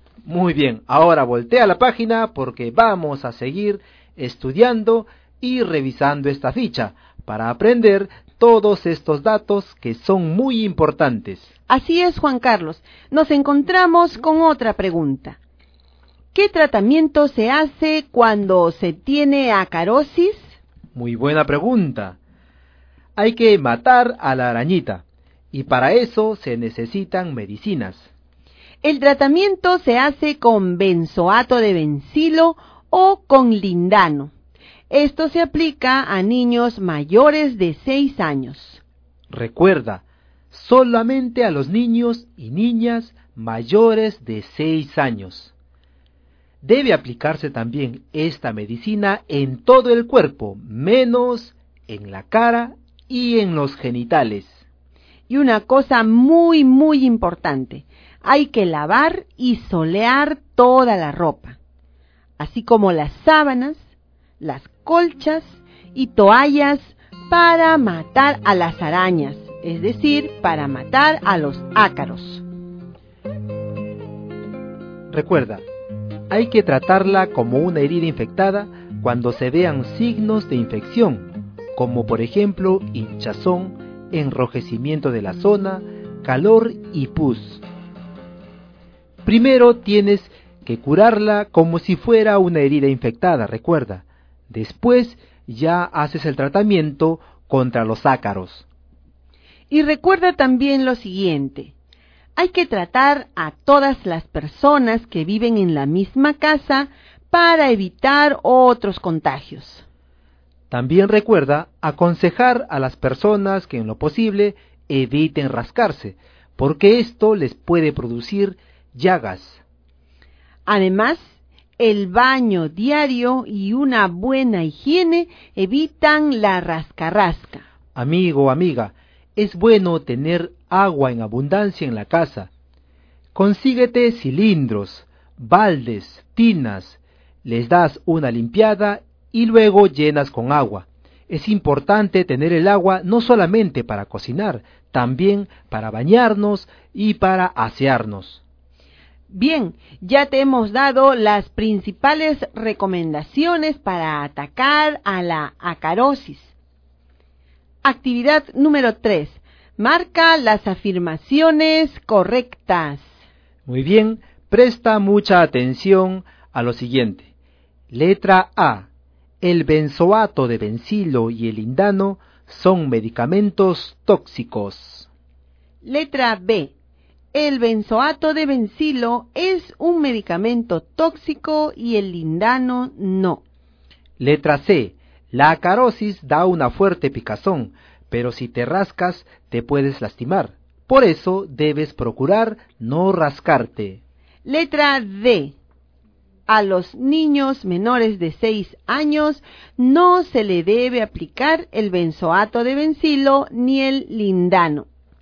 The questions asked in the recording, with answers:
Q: A los niños menores de 6 años no se le debe aplicar el benzoato de benzilo ni el lindano.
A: a los niños menores de 6 años no se les debe aplicar esta medicina